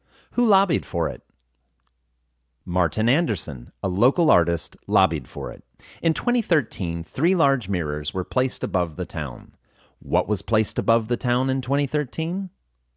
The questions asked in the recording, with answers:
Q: What was placed above the town in 2013?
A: Three large mirrors were placed above the town in 2013.